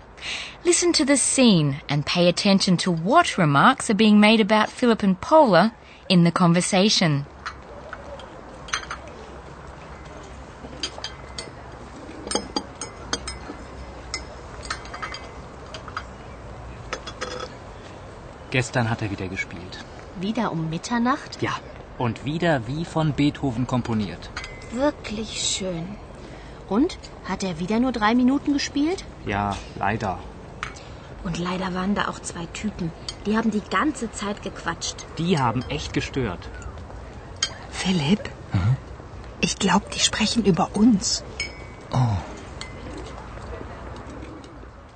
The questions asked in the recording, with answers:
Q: Listen to the scene and pay attention to what remarks are being made about Philip and Paula in the conversation.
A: The female student complains that 2 Typen, a slang word for people, had talked gequatscht, another slang word, the whole time.